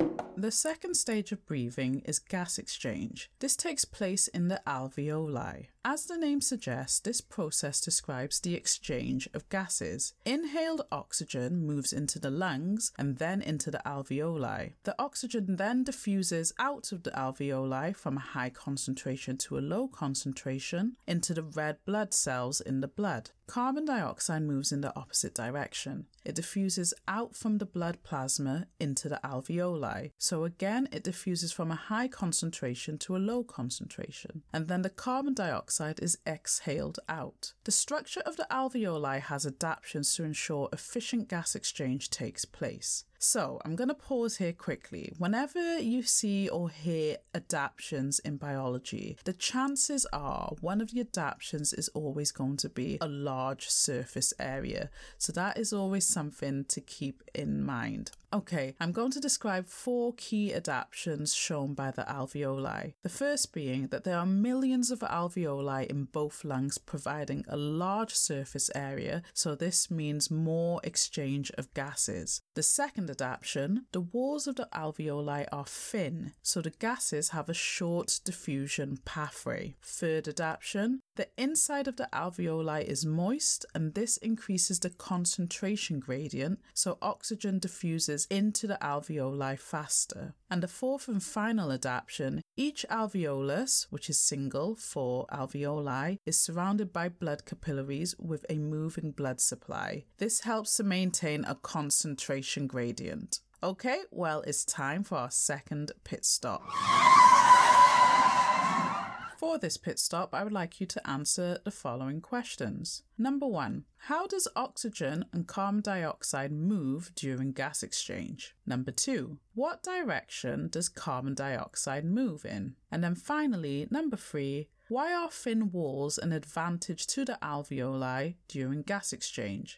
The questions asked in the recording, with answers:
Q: Number one, how does oxygen and carbon dioxide move during gas exchange?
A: The correct answer is by the process diffusion.

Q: Number two, what direction does carbon dioxide move in?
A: So it is out of the blood into the alveoli and then out of the body.

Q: And then finally, number three, why are thin walls an advantage to the alveoli during gas exchange?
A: it provides a short diffusion pathway, therefore gas exchange will occur faster.